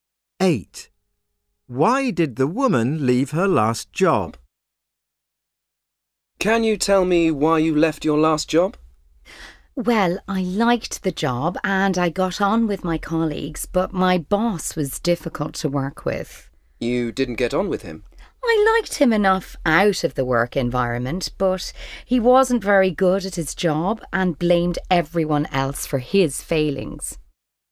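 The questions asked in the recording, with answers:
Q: Why did the woman leave her last job?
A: her boss was difficult to work with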